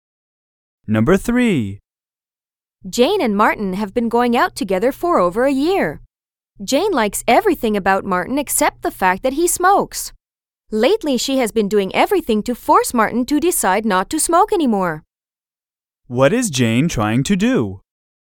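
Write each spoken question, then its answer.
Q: What is Jane trying to do?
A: Get Martin to stop smoking.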